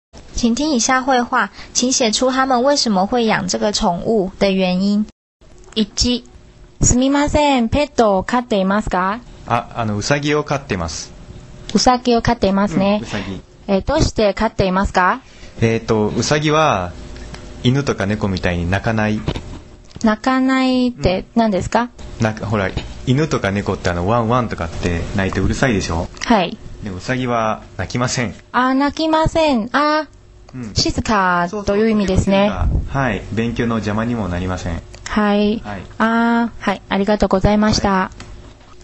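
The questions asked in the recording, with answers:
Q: 请写出他们为什么会养这个宠物的原因。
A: 兔子不叫,很安静,不妨碍学习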